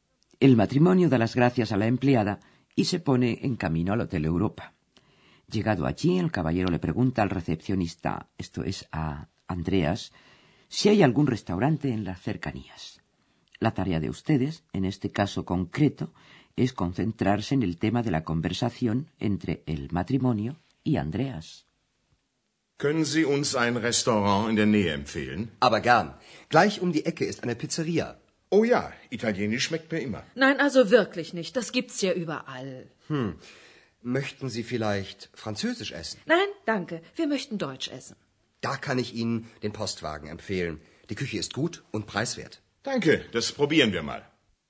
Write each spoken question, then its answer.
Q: La tarea de ustedes, en este caso concreto, es concentrarse en el tema de la conversación entre el matrimonio y Andreas.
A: El tema de la conversación es acerca de los gustos en materia de cocina.